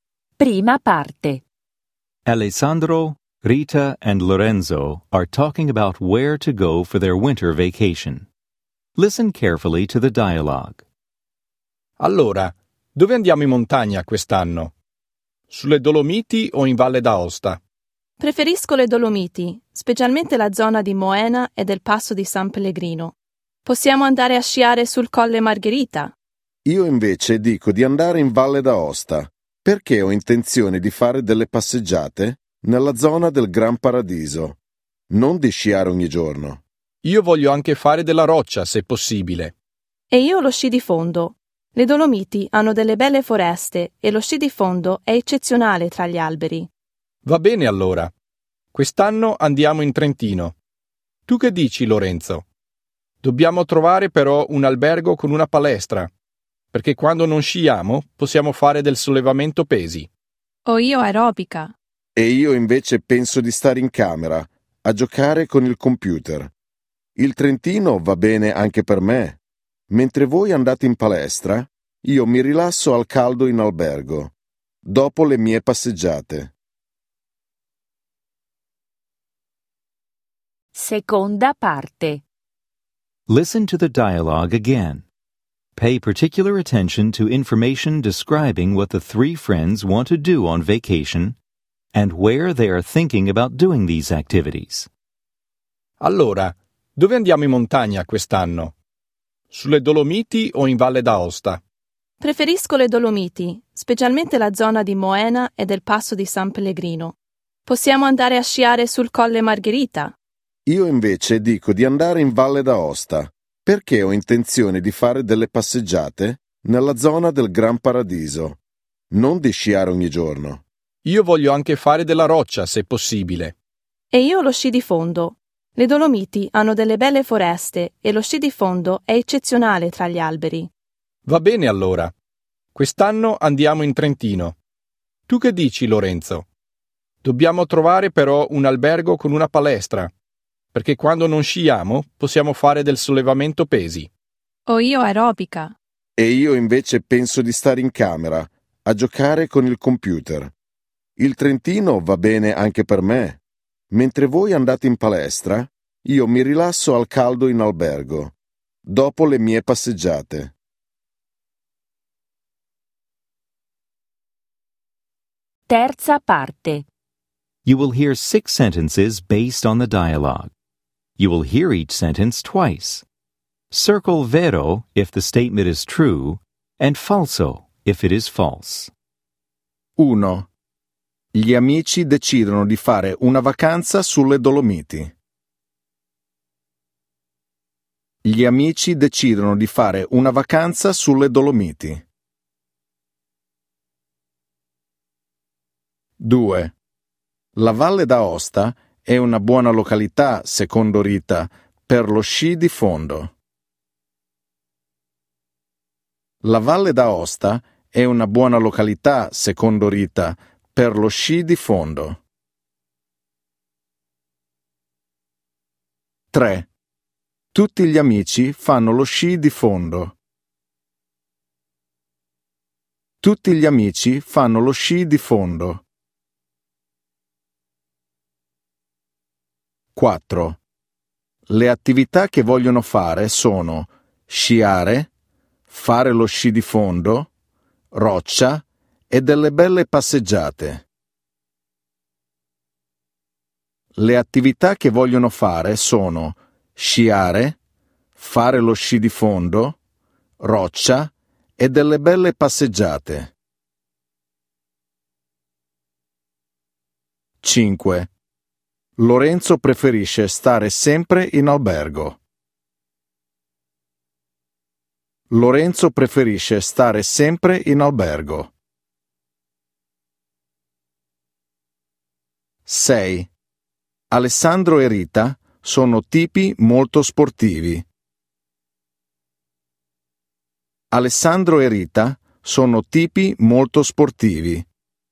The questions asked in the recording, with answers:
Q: Gli amici decidono di fare una vacanza sulle Dolomiti.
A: Vero

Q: La Valle d'Aosta è una buona località, secondo Rita, per lo sci di fondo.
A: Falso

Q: Tutti gli amici fanno lo sci di fondo.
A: Falso

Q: Le attività che vogliono fare sono sciare, fare lo sci di fondo, roccia e delle belle passeggiate.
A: Vero.

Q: Lorenzo preferisce stare sempre in albergo.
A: Falso.

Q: Alessandro e Rita sono tipi molto sportivi.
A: Vero.